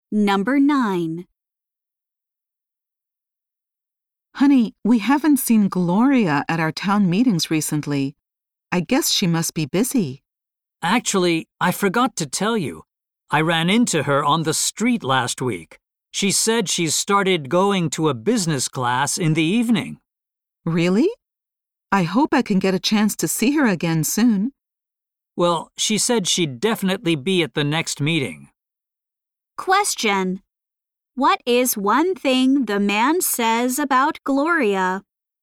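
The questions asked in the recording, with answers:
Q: What is one thing the man says about Gloria?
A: He saw her on the street last week.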